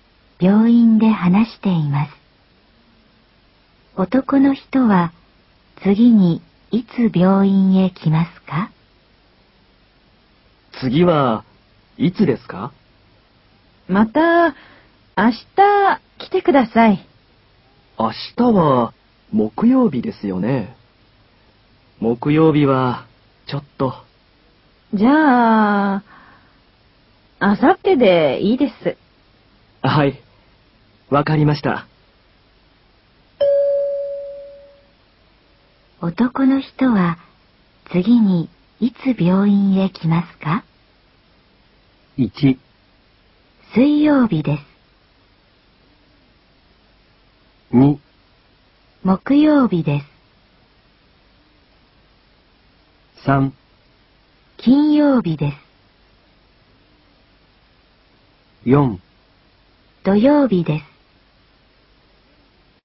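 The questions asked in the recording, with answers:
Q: 男の人は次にいつ病院へ来ますか?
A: 3: 金曜日です。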